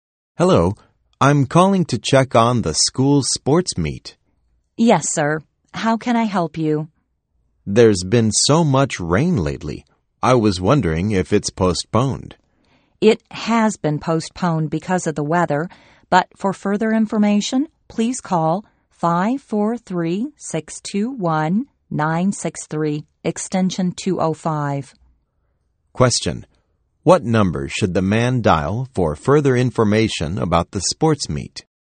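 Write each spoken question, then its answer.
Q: What number should the man dial for further information about the sports meet?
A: 543-621-963, extension 205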